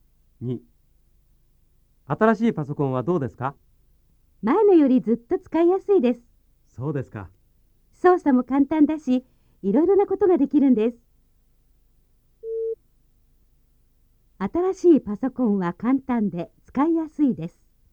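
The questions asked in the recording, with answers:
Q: 新しいパソコンは簡単で使いやすいです。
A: ○(正しい)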